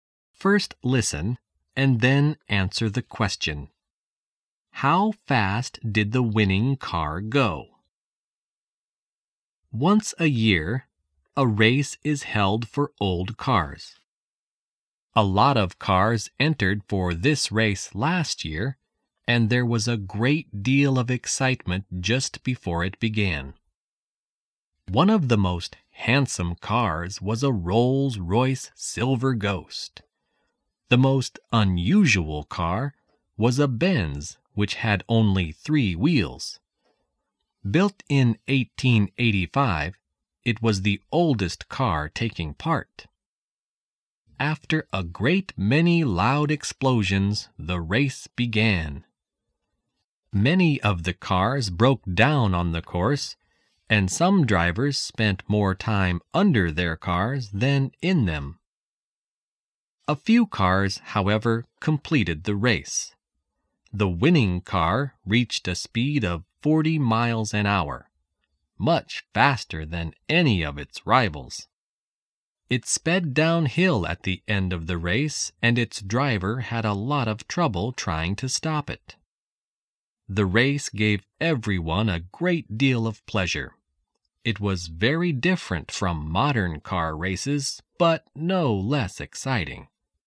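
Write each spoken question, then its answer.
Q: How fast did the winning car go?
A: 40 miles an hour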